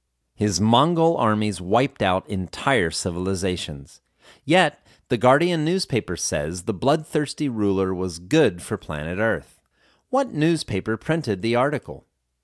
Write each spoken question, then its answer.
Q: What newspaper printed the article?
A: The Guardian newspaper printed the article.